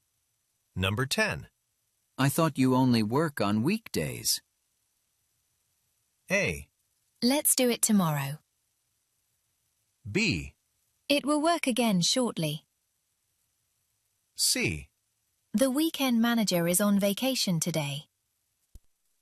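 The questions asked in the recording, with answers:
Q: I thought you only work on weekdays.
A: C: The weekend manager is on vacation today.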